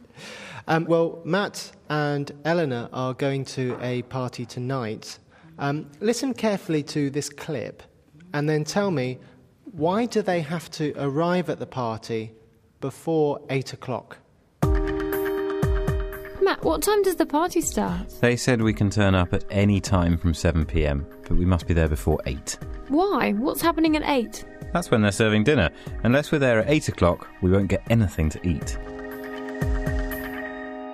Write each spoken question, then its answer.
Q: why do they have to arrive at the party before 8 o'clock?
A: Maybe they will have nothing to eat after 8 o'clock.